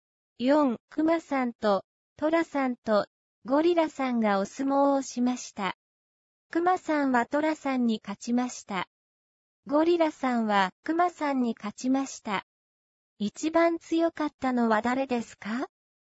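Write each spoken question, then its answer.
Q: 一番強かったのは誰ですか?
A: ゴリラさん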